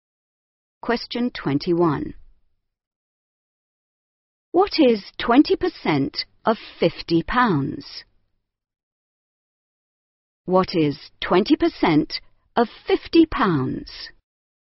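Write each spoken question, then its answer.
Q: What is 20% of 50 pounds?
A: 10 pounds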